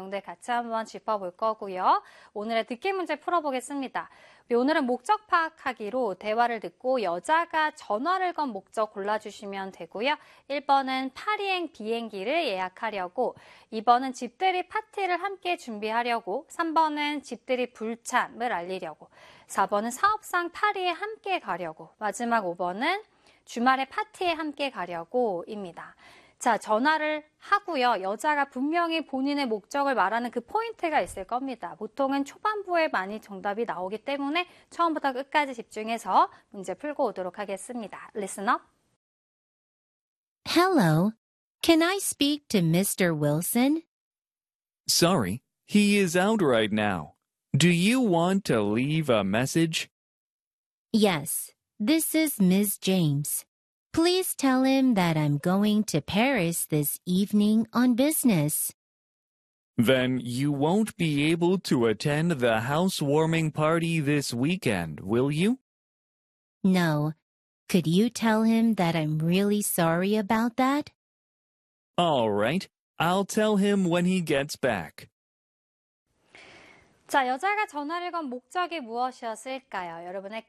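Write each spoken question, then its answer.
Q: 자, 여자가 전화를 건 목적이 무엇이었을까요?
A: 3: 집들이 불참을 알리려고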